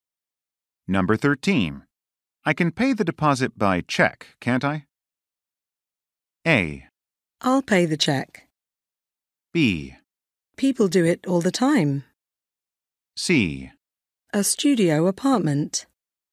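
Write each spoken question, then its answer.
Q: I can pay the deposit by check, can't I?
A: B: People do it all the time.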